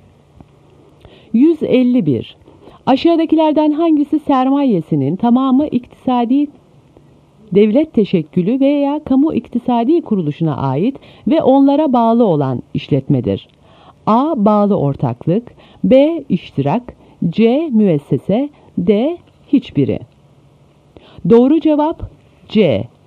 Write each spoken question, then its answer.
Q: Aşağıdakilerden hangisi sermayesinin tamamı iktisadi devlet teşekkülü veya kamu iktisadi kuruluşuna ait ve onlara bağlı olan işletmedir?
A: Doğru cevap C. Müessese.